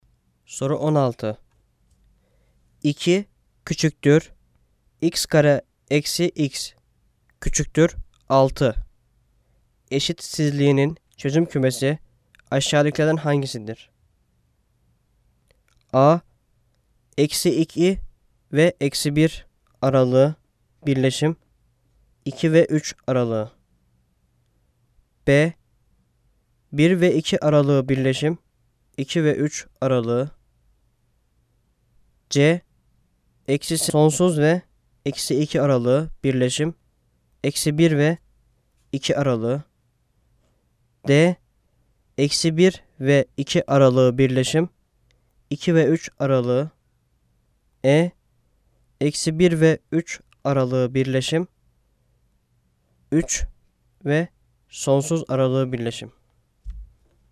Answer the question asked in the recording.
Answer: Cevap A. Eksi 2, eksi 1 aralığı birleşim, 2 ve 3 aralığı.